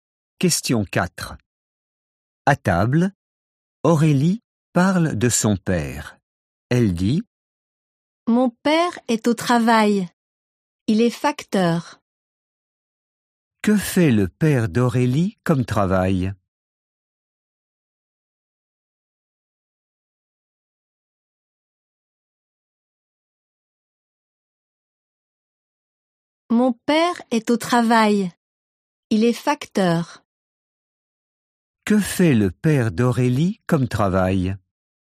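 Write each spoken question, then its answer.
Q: Que fait le père d'Aurélie comme travail?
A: Il est facteur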